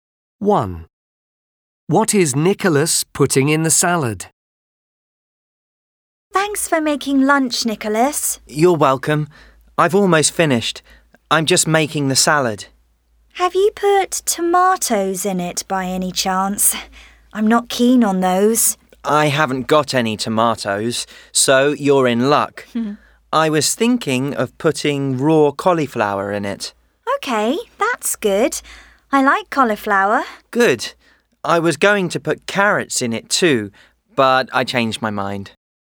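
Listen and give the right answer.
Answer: Raw cauliflower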